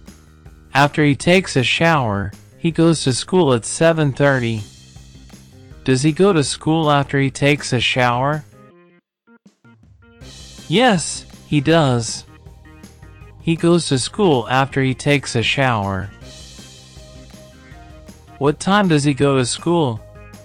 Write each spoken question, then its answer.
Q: What time does he go to school?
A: At 7:30. He goes to school at 7:30.